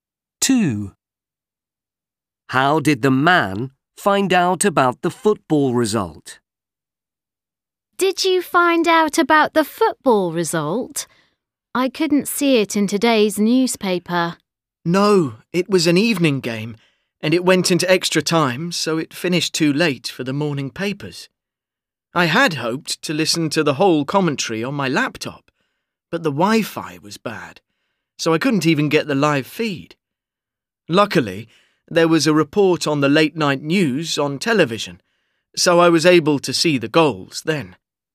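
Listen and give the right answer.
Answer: From the late-night news on television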